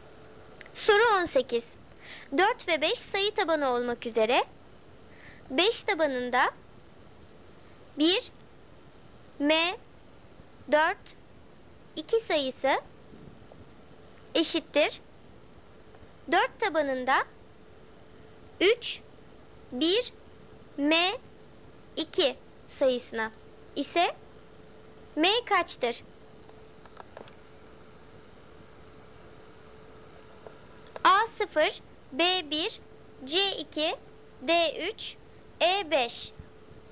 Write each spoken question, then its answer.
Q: Soru 18. 4 ve 5 sayı tabanı olmak üzere 5 tabanında 1, M, 4, 2 sayısı eşittir 4 tabanında 3, 1, M, 2 sayısına ise M kaçtır?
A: Doğru cevap D 3.